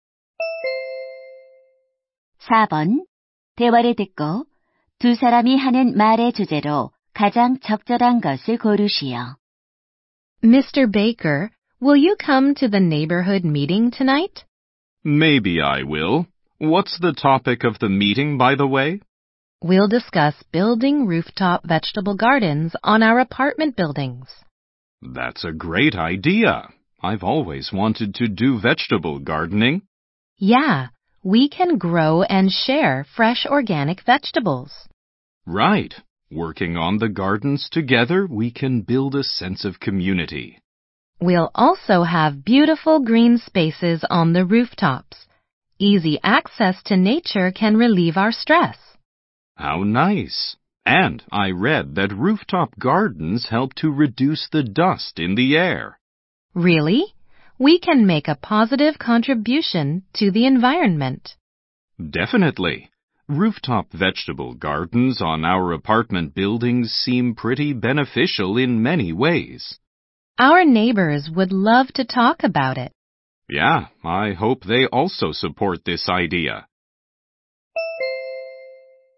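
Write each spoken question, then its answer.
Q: 대화를 듣고 두 사람이 하는 말의 주제로 가장 적절한 것을 고르시오.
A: 아파트 옥상 텃밭의 이점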